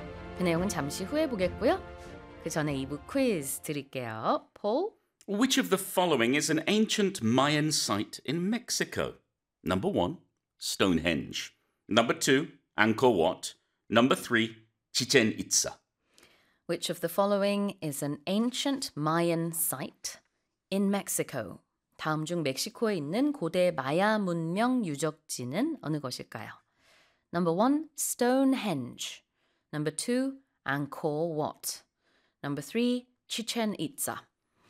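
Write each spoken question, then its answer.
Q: Which of the following is an ancient Mayan site in Mexico?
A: 3: Chichen Itza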